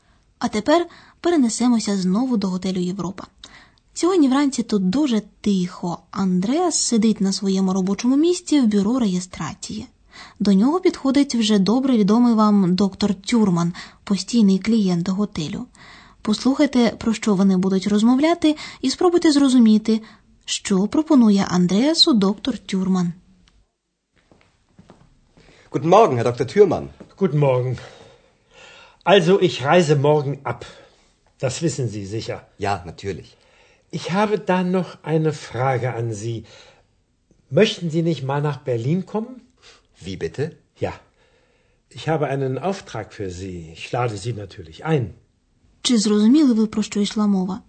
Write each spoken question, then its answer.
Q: спробуйте зрозуміти, що пропонує Андреасу доктор Тюрман.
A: Завтра доктор Тюрман виїжджає з готелю і він запитує Андреаса, чи не хотів би той поїхати в Берлін.